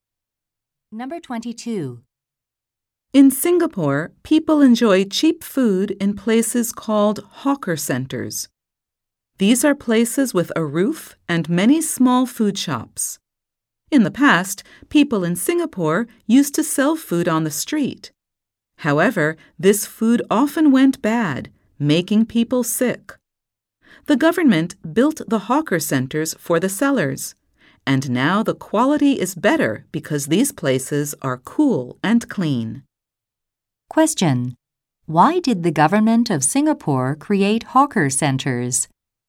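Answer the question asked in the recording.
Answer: Street food often went bad and made people sick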